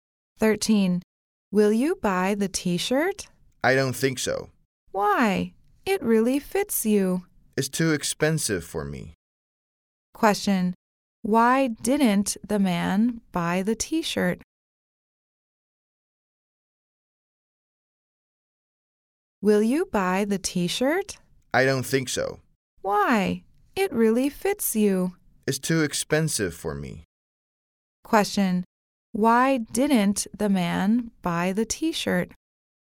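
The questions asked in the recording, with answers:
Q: Question. Why didn't the man buy the t-shirt?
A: It's too expensive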